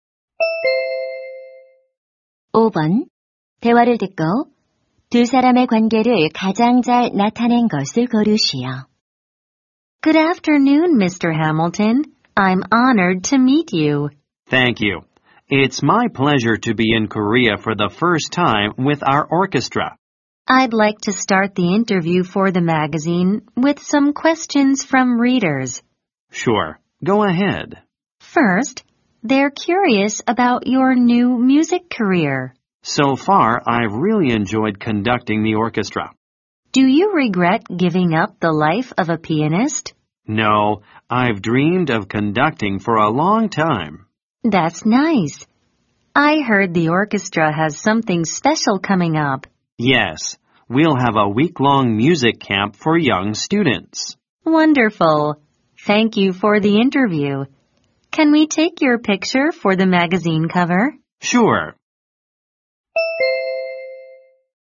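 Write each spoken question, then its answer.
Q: 대화를 듣고 두 사람의 관계를 가장 잘 나타낸 것을 고르시오.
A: 잡지 기자 - 오케스트라 지휘자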